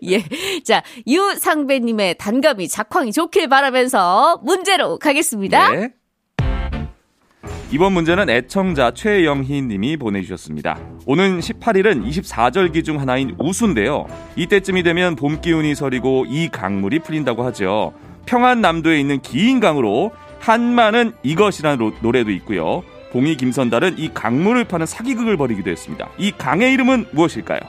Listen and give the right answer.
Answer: 대동강이요. 대동강.